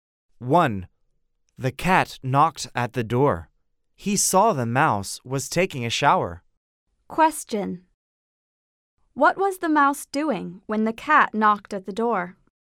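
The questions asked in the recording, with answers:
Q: What was the mouse doing when the cat knocked at the door?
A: He was taking a shower.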